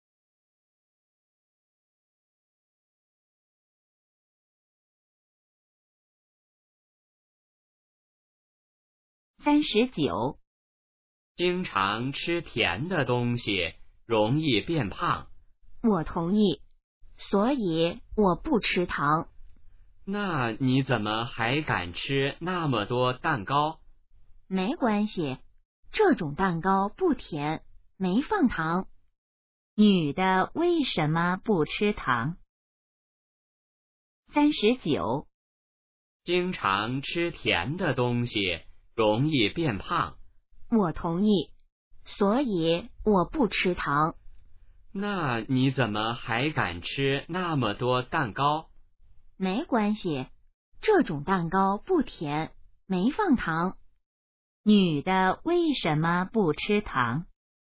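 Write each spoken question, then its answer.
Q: 女的为什么不吃糖?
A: 吃甜的东西容易变胖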